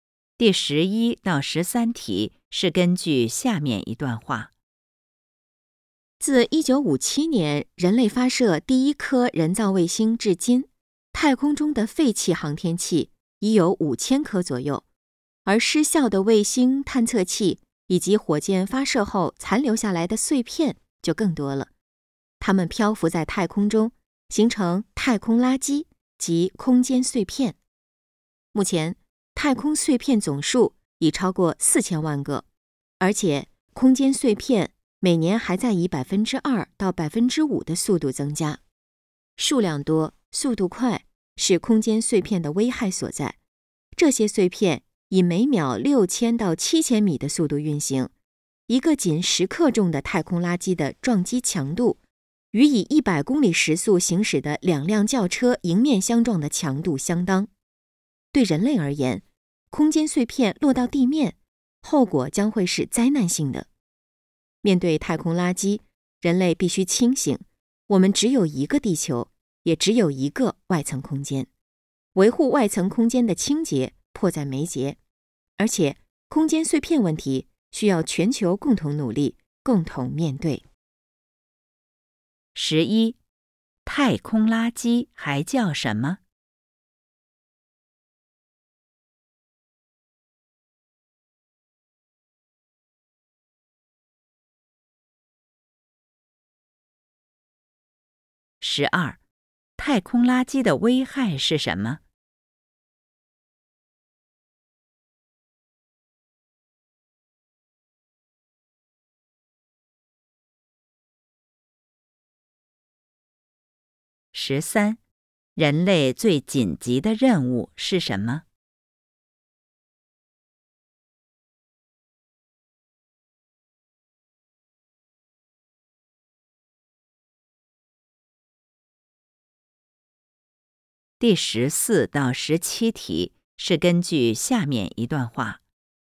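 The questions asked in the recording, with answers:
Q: 太空垃圾还叫什么?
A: 空间碎片

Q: 太空垃圾的危害是什么?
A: 数量多,速度快

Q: 人类最紧急的任务是什么?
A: 维护外层空间的清洁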